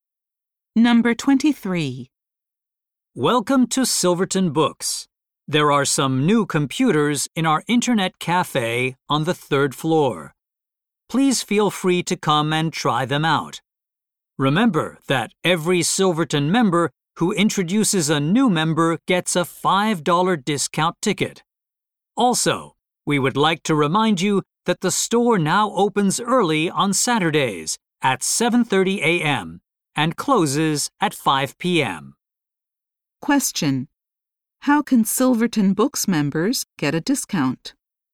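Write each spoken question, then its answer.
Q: how can Silverton Books members get a discount?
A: By introducing a new member.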